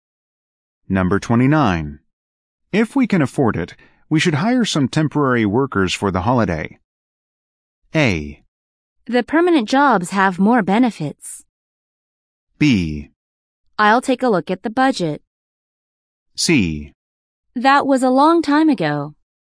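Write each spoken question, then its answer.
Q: If we can afford it, we should hire some temporary workers for the holiday.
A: B: I'll take a look at the budget.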